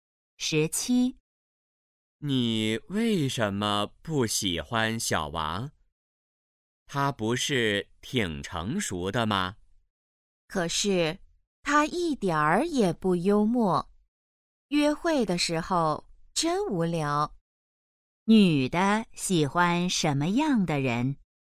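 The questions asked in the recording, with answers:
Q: 女的喜欢什么样的人?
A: 幽默的人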